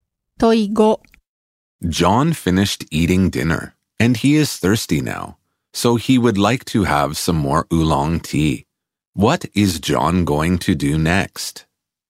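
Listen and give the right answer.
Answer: Have some more oolong tea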